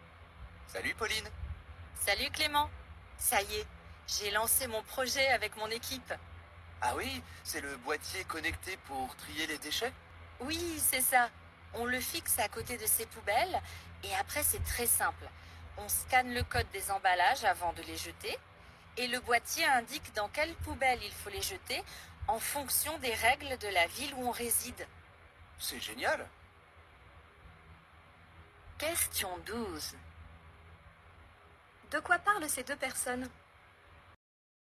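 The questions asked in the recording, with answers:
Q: De quoi parlent ces deux personnes ?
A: D'un boîtier connecté pour trier les déchets, le projet de Pauline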